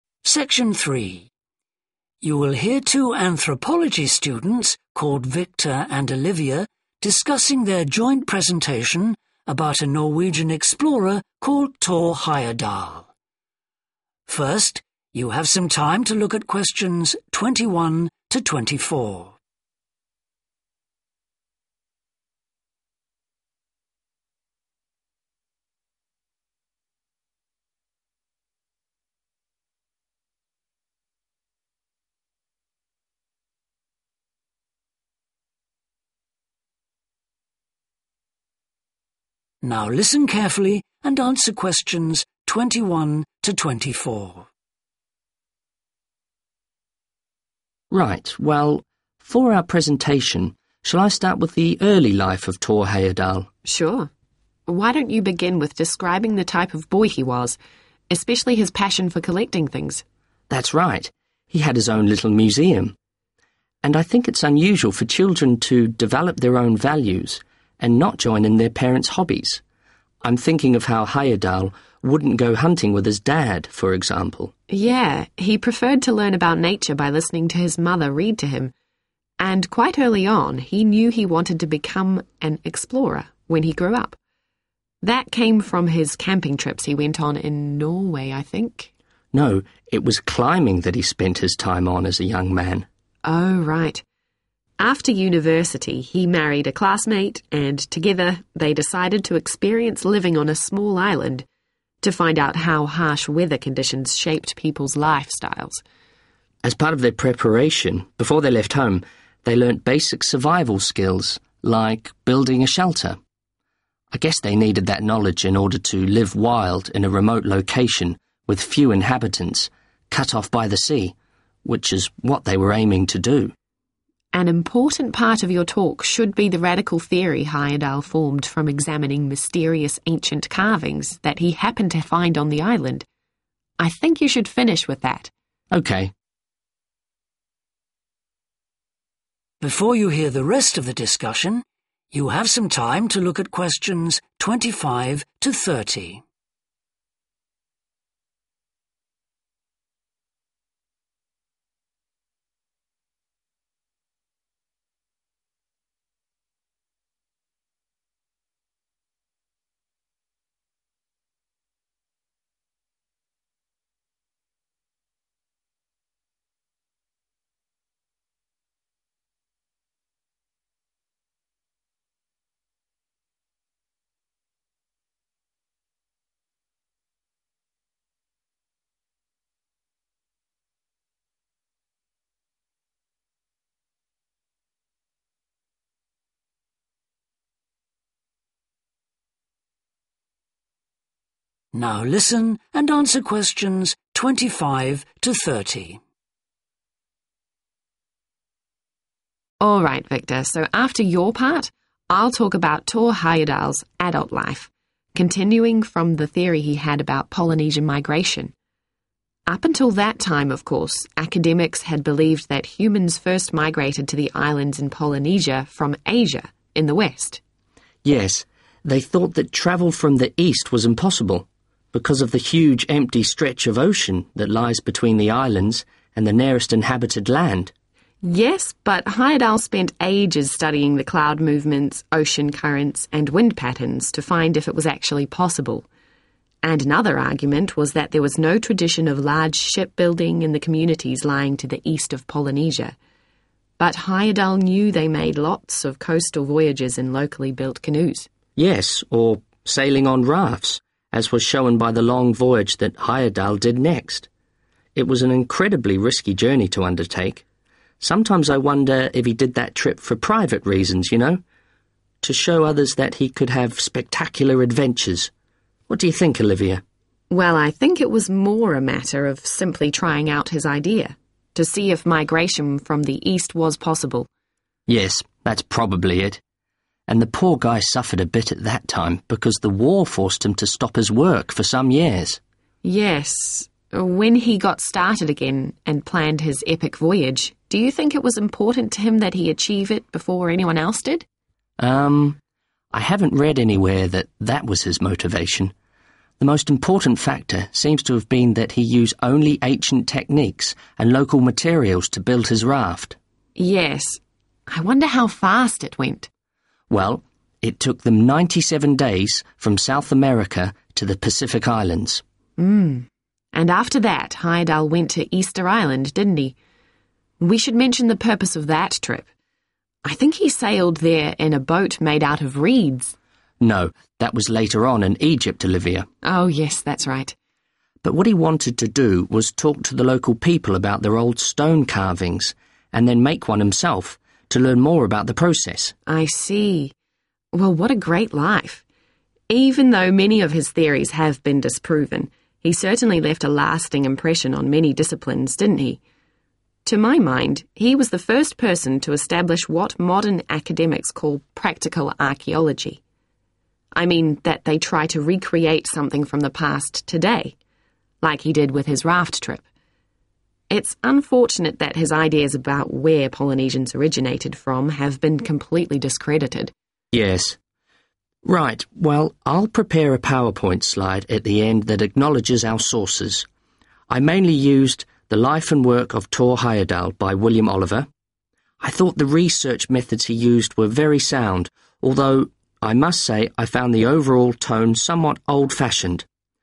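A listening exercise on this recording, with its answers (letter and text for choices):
Choose the correct letter, A, B or C.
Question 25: According to Victor and Olivia, academics thought that Polynesian migration from the east was impossible due to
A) the fact that Eastern countries were far away.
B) the lack of materials for boat building.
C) the direction of the winds and currents.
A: A) the fact that Eastern countries were far away.

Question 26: Which do the speakers agree was the main reason for Heyerdahl's raft journey?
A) to overcome a research setback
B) to demonstrate a personal quality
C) to test a new theory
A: C) to test a new theory

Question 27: What was most important to Heyerdahl about his raft journey?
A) the fact that he was the first person to do it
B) the speed of crossing the Pacific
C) the use of authentic construction methods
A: C) the use of authentic construction methods

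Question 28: Why did Heyerdahl go to Easter Island?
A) to build a stone statue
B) to sail a reed boat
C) to learn the local language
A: A) to build a stone statue

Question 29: In Olivia's opinion, Heyerdahl's greatest influence was on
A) theories about Polynesian origins.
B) the development of archaeological methodology.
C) establishing archaeology as an academic subject.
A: B) the development of archaeological methodology.

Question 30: Which criticism do the speakers make of William Oliver's textbook?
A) Its style is out of date.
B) Its content is over-simplified.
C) Its methodology is flawed.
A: A) Its style is out of date.

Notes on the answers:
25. Yes, they thought that travel from the east was impossible, because of the huge, empty stretch of ocean that lies between the islands and the nearest inhabited land [Đúng vậy, họ nghĩ rằng việc đi lại từ phía Đông là không thể, bởi vì có một đại dương rộng lớn và trống trải nằm giữa các hòn đảo và vùng đất có người sinh sống gần nhất].
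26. Victor: Yes, that's probably it. [Olivia: Chà, tôi nghĩ vấn đề đơn giản hơn là thử ý tưởng của ông ấy, để xem liệu việc di cư từ phía đông có khả thi hay không. Victor: Đúng, có lẽ là vậy.]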